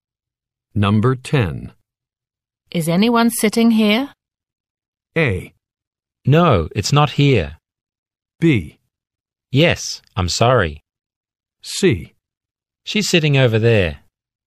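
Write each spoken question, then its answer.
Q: Is anyone sitting here?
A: B: Yes, I'm sorry.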